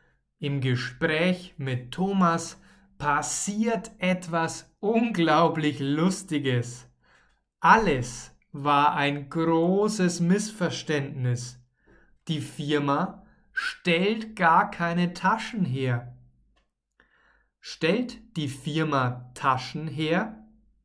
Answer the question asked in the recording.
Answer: Nein, die Firma stellt keine Taschen her.